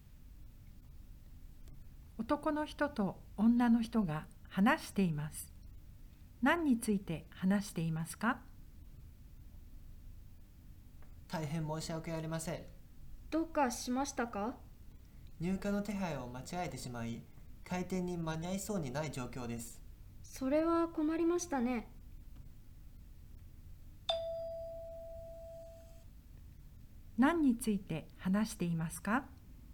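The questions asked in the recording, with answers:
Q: 何について話していますか?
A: 入荷の手配ミスで開店に間に合わないこと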